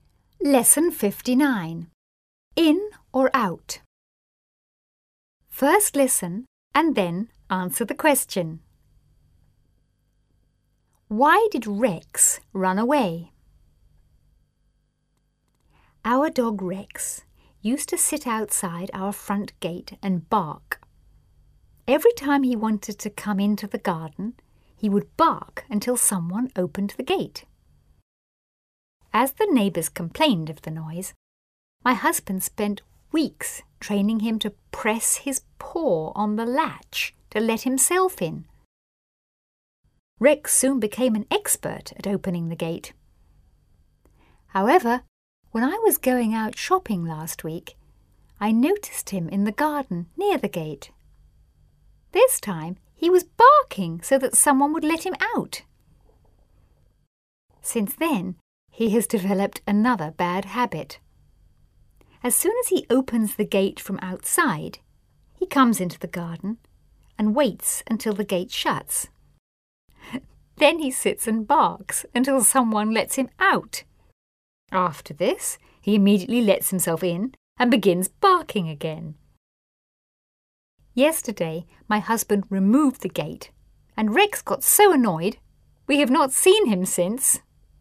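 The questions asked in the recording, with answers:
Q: Why did Rex run away?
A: Because the husband removed the gate and Rex got annoyed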